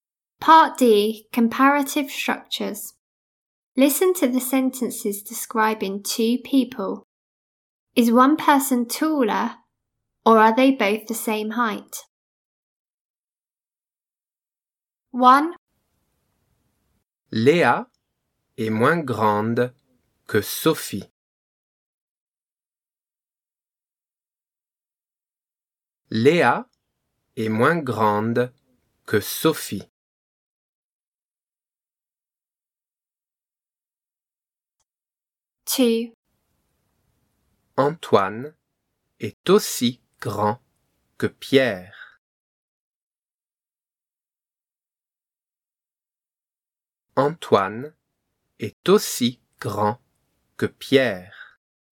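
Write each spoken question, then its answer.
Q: Is one person taller or are they both the same height?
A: One is taller (Sophie)

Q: Is one person taller or are they both the same height?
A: Both the same height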